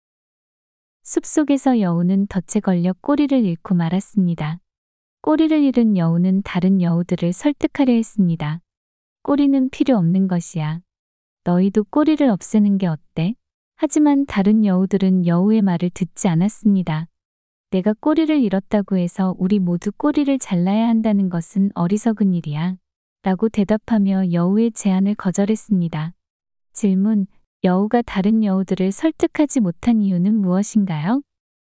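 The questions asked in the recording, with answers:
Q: 여우가 다른 여우들을 설득하지 못한 이유는 무엇인가요?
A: 자기가 꼬리를 잃었다고 모두 꼬리를 자르자는 것은 어리석은 일이라고 다른 여우들이 생각했기 때문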